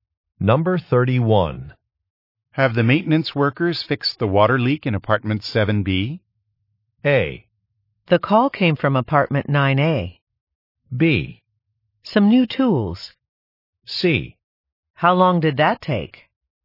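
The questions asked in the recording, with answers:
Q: Have the maintenance workers fixed the water leak in apartment 7B?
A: A: The call came from apartment 9A.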